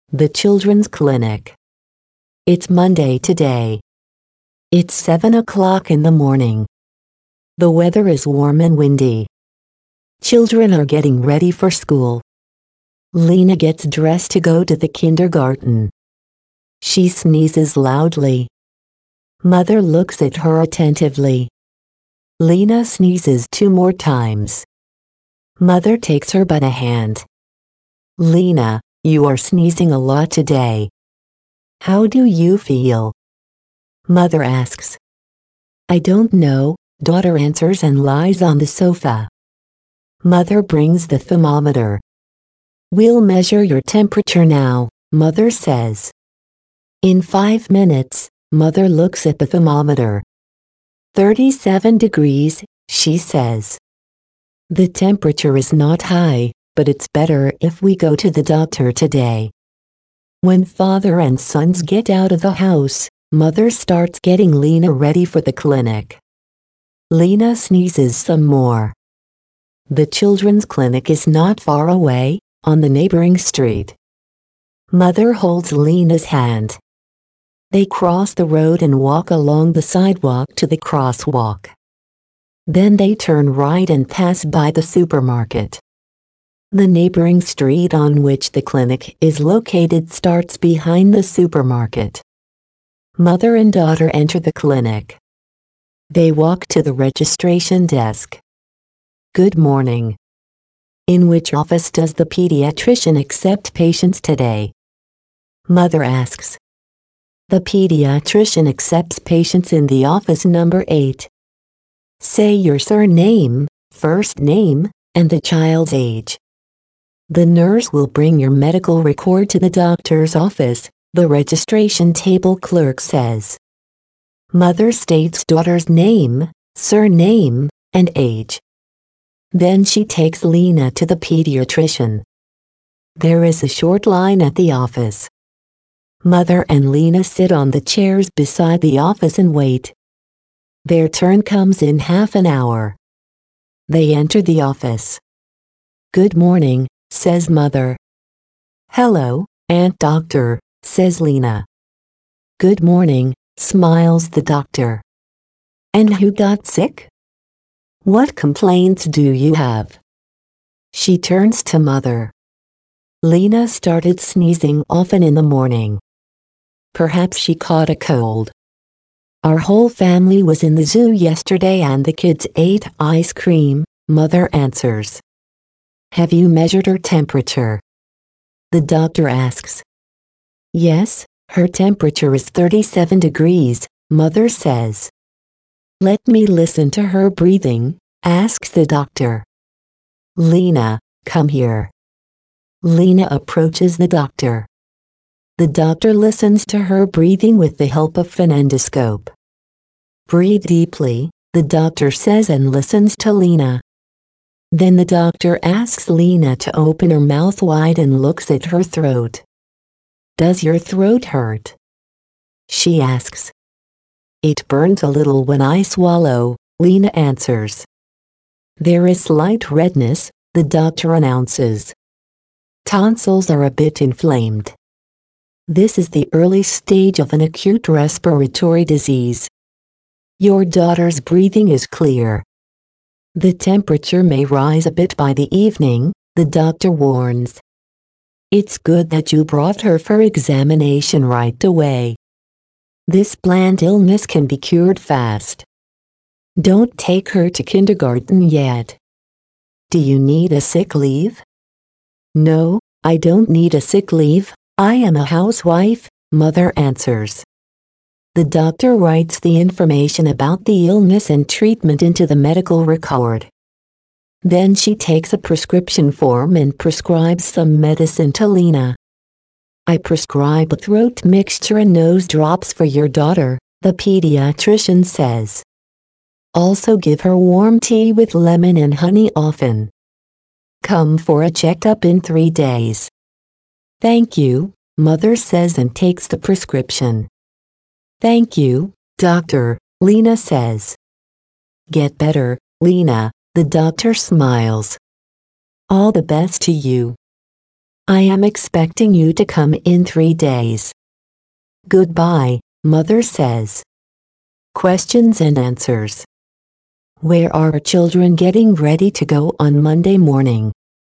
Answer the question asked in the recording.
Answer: Children are getting ready for school.